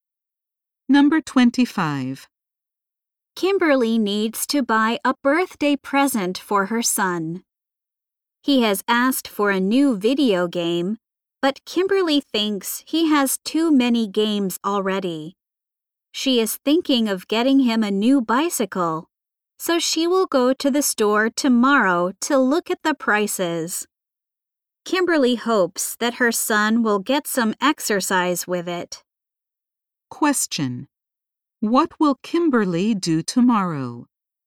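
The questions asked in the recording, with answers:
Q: What will Kimberly do tomorrow?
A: Go to the store to look at bicycle prices.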